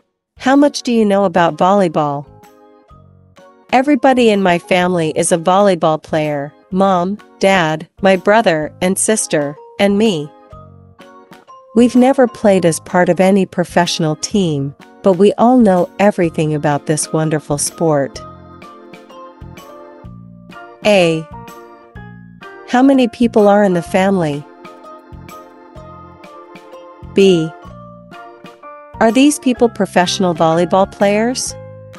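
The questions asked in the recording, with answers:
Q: How many people are in the family?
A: Five

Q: Are these people professional volleyball players?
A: No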